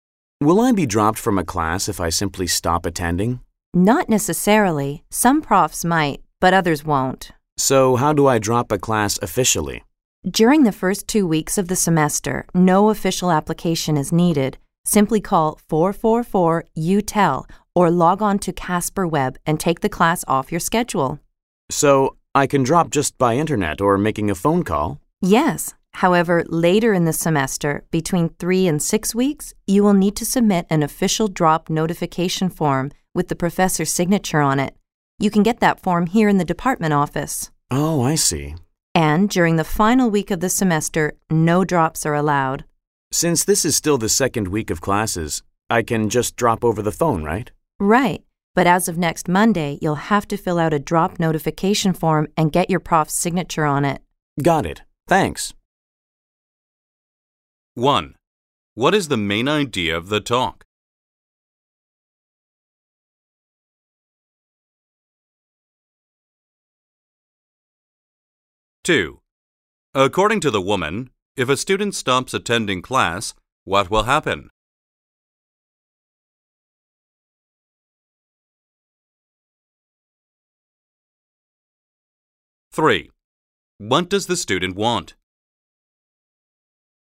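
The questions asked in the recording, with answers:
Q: What is the main idea of the talk?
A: How to drop a class

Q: According to the woman, if a student stops attending class, what will happen?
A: It depends on the professor; some may drop the student, others won't

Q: What does the student want?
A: To drop a class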